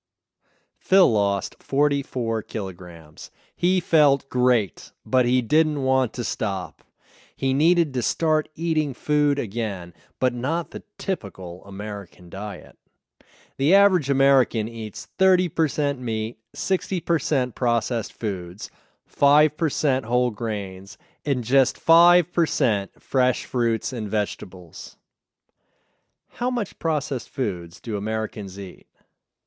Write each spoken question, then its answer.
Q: How much processed foods do Americans eat?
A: Americans eat 60% processed foods.